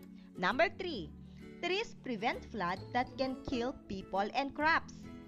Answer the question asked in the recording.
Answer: Very good. It's, it is a fact.